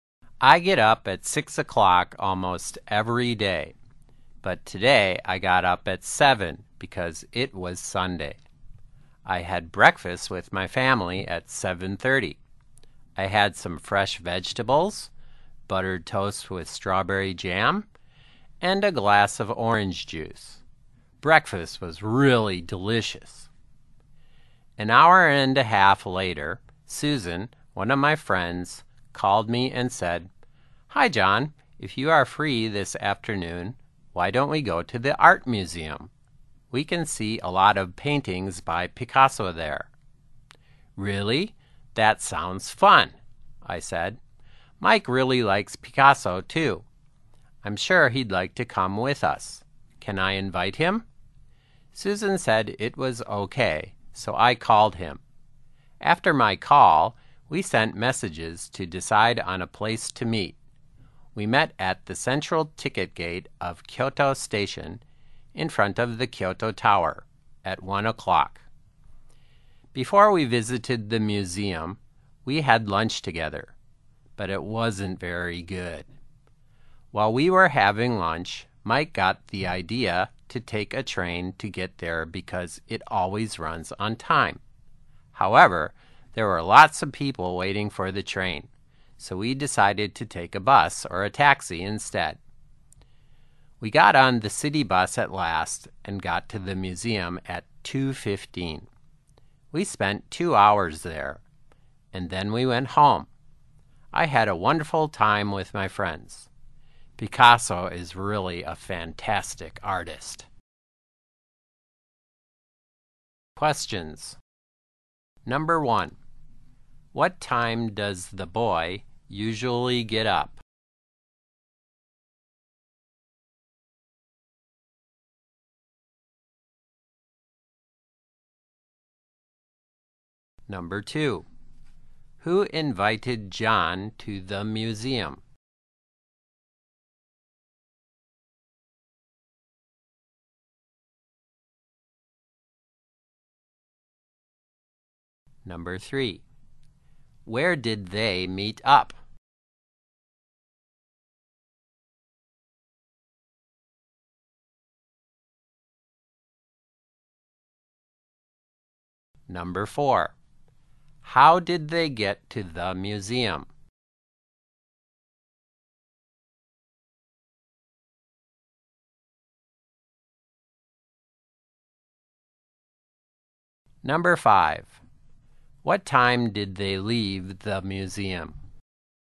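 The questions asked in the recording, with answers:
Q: What time does the boy usually get up?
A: At 6 o'clock

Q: Who invited John to the museum?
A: Susan

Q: Where did they meet up?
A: At the central ticket gate of Kyoto Station

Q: How did they get to the museum?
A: By city bus

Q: What time did they leave the museum?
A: At 4:15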